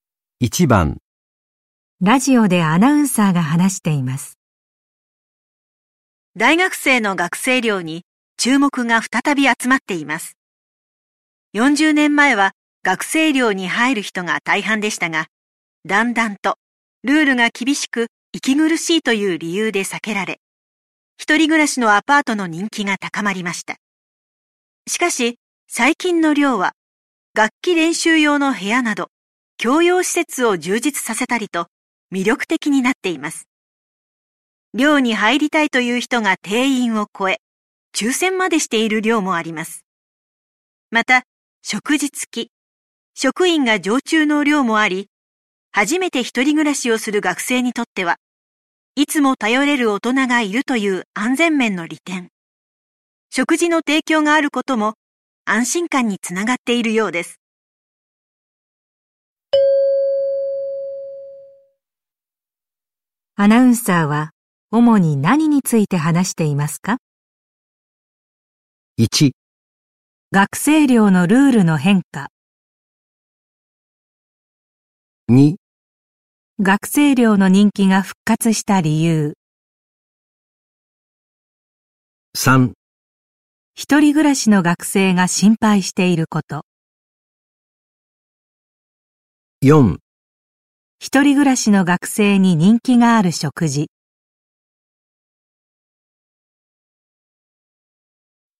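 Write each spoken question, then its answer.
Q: アナウンサーは主に何について話していますか?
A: 2: 学生寮の人気が復活した理由。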